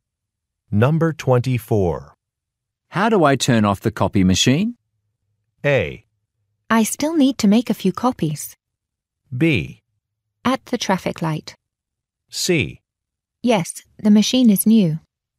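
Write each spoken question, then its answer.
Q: How do I turn off the copy machine?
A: A: I still need to make a few copies.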